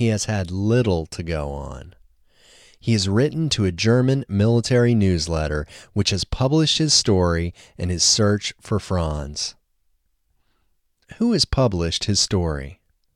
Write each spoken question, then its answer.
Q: Who has published his story?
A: A German military newsletter has published his story.